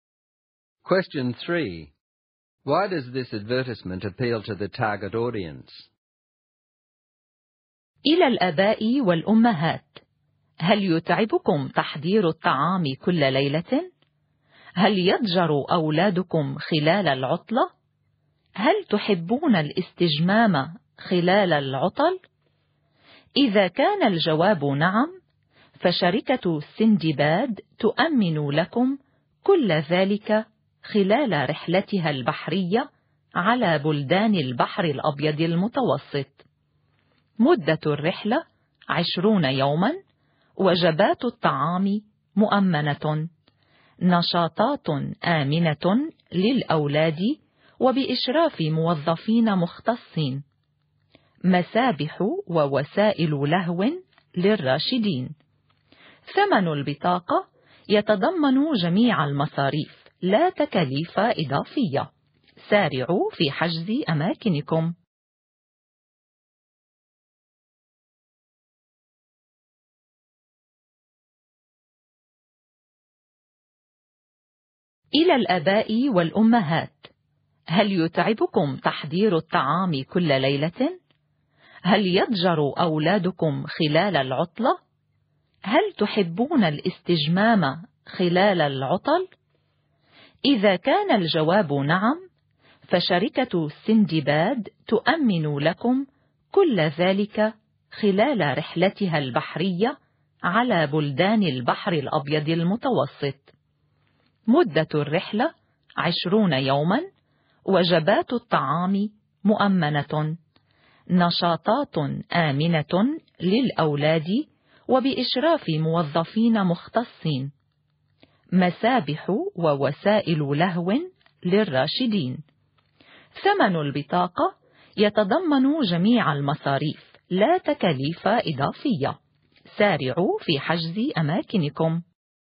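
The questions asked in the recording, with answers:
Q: Why does this advertisement appeal to the target audience?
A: Parents get a relaxing 20-day Mediterranean cruise with meals provided, supervised safe activities for children, pools and entertainment for adults, and an all-inclusive price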